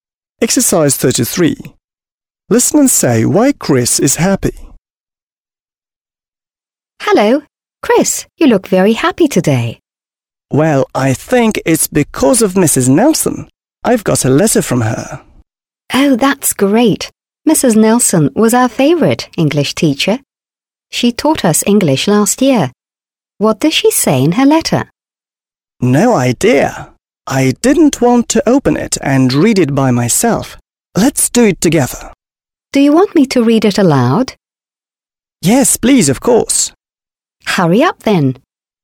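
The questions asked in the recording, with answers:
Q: Listen and say why Chris is happy.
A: Because he got a letter from Mrs. Nelson, his former English teacher.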